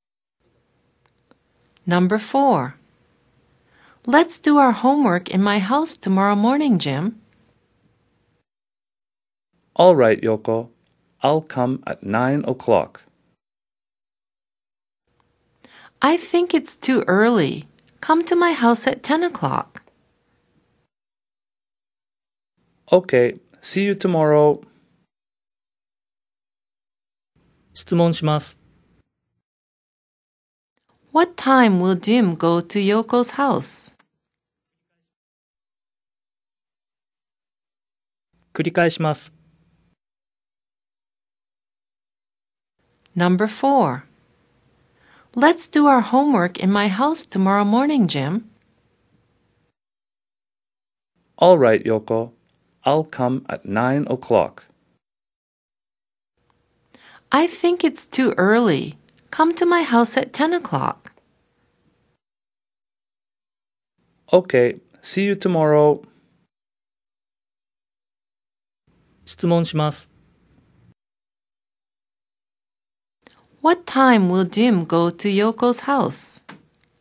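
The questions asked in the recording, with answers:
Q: What time will Jim go to Yoko's house?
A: At 10 o'clock.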